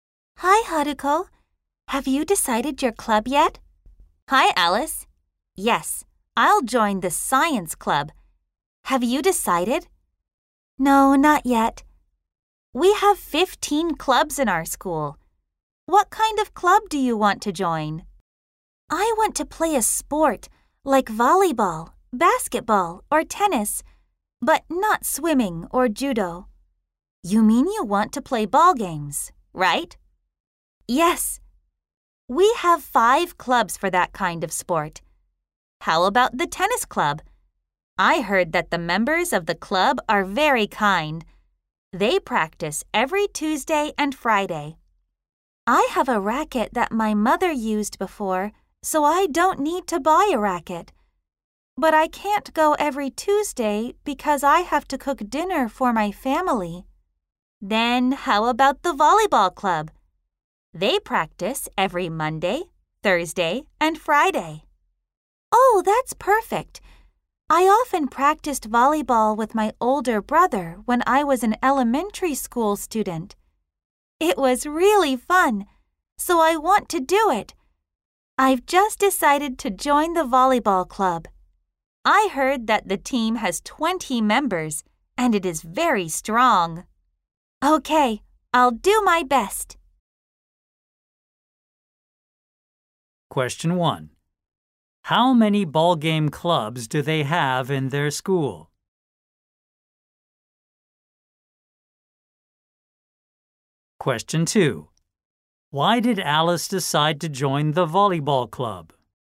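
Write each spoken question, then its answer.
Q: How many ball game clubs do they have in their school?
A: Five

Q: Why did Alice decide to join the volleyball club?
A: Because she often practiced volleyball with her older brother in elementary school and it was really fun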